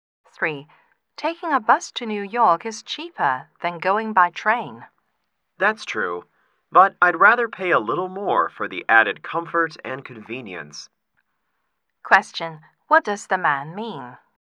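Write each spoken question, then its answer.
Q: What does the man mean?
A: He would rather take the train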